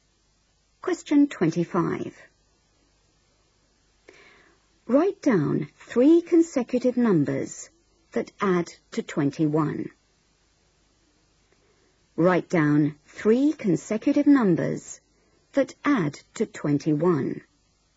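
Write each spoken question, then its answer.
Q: Write down 3 consecutive numbers that add to 21.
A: 6, 7, 8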